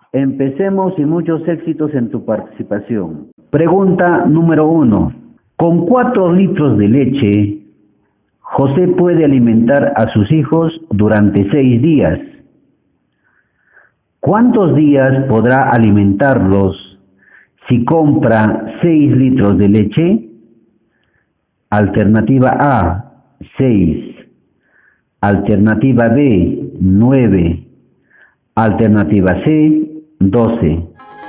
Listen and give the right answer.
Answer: La alternativa B.